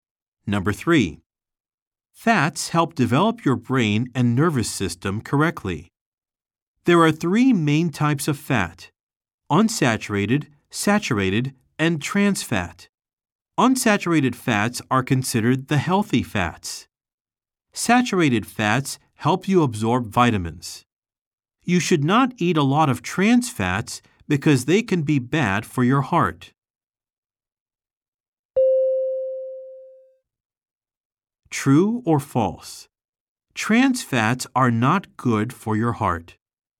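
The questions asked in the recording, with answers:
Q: True or false? Trans fats are not good for your heart.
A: True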